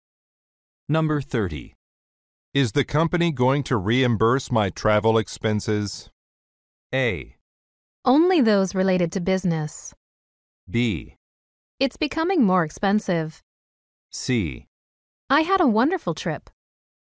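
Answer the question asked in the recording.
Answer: A: Only those related to business.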